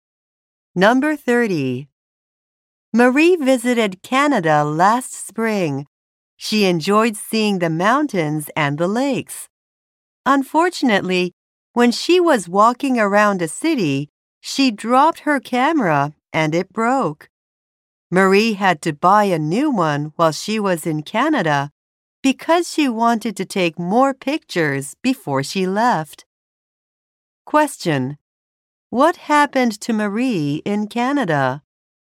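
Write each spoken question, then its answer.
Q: What happened to Marie in Canada?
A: She dropped and broke her camera.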